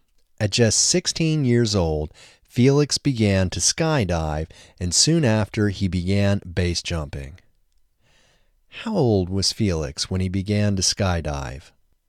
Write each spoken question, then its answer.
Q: How old was Felix when he began to skydive?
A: Felix was just 16 when he began to skydive.